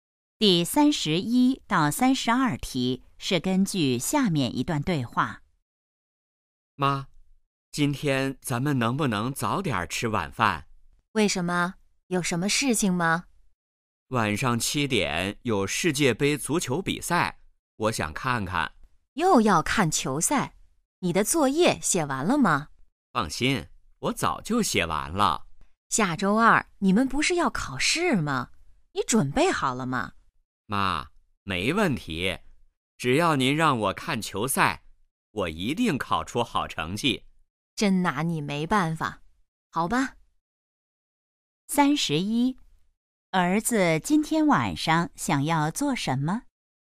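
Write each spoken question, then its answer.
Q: 儿子今天晚上想要做什么?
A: 看世界杯足球比赛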